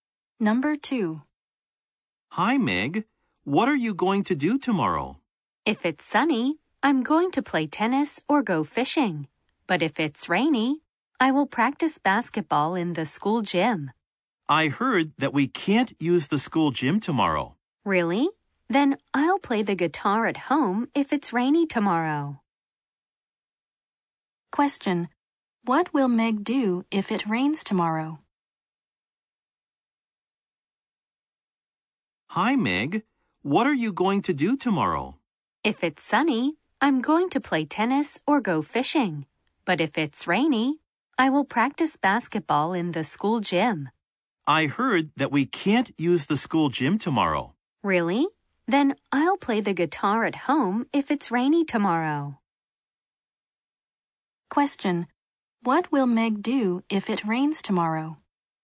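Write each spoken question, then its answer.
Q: What will Meg do if it rains tomorrow?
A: Play the guitar at home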